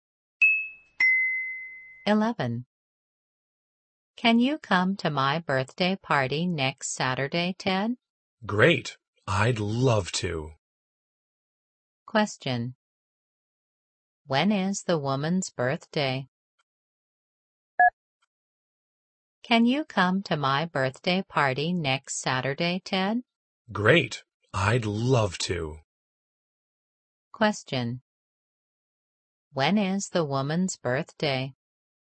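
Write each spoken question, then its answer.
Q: When is the woman's birthday?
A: Next Saturday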